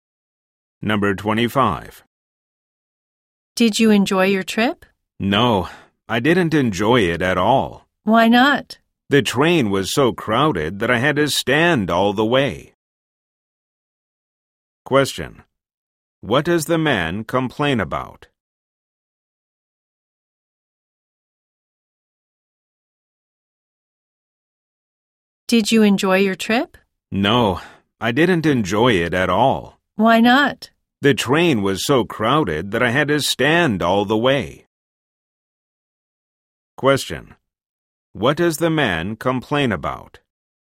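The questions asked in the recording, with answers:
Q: What does the man complain about?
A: The train was so crowded that he had to stand all the way.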